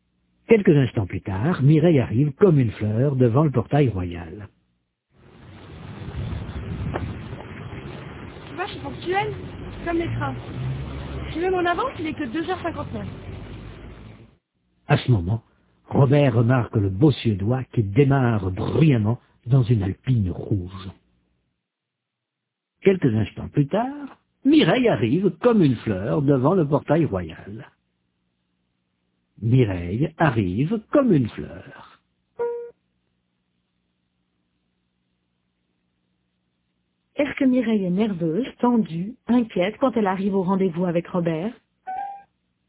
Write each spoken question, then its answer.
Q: Est-ce que Mireille est nerveuse, tendue, inquiète quand elle arrive au rendez-vous avec Robert?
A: Non, elle arrive comme une fleur.